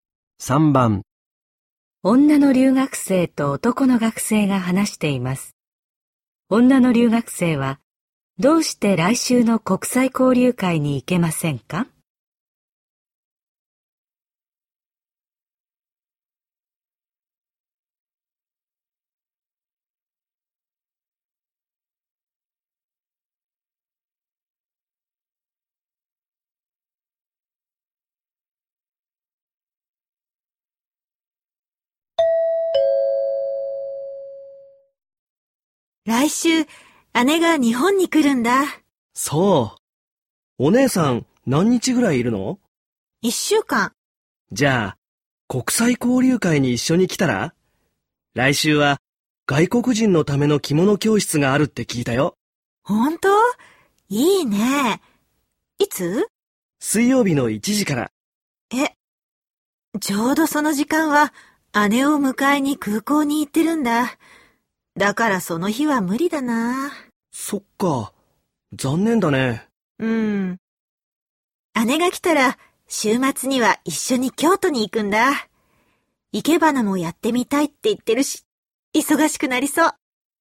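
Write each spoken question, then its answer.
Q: 女の留学生は、どうして来週の国際交流会に行けませんか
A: その時間は姉を迎えに空港に行くから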